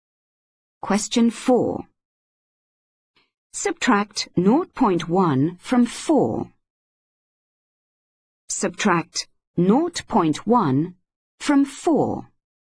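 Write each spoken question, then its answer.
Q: Subtract 0.1 from 4.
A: 3.9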